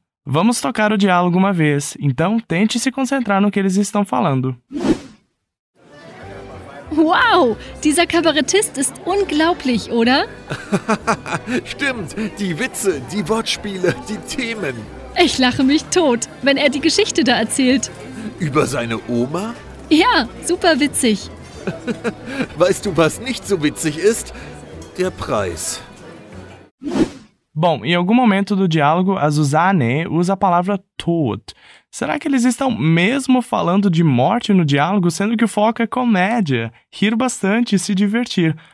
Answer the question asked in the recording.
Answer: Bom, é claro que ela continua vivinha.